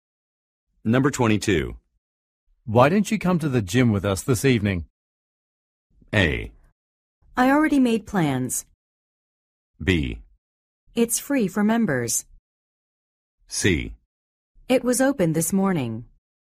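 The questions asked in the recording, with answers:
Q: Why don't you come to the gym with us this evening?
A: A: I already made plans.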